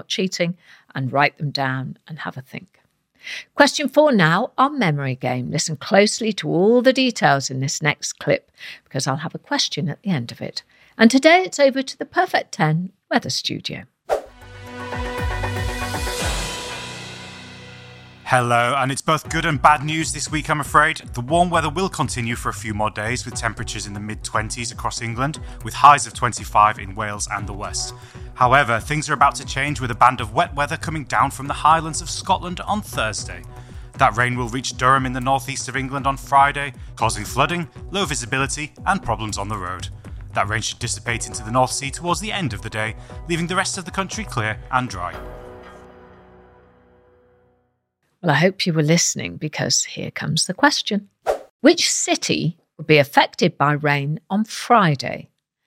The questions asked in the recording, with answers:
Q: Which city would be affected by rain on Friday?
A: the answer was Durham.